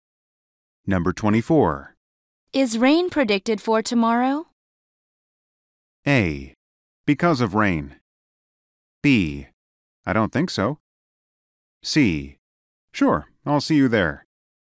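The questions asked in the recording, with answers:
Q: Is rain predicted for tomorrow?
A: B: I don't think so.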